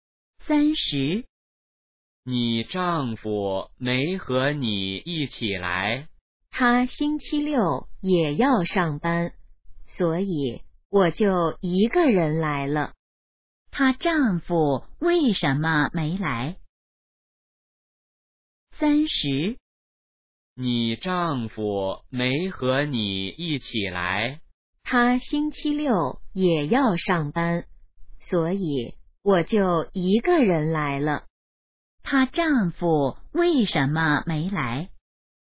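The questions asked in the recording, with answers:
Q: 他丈夫为什么没来?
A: 星期六要上班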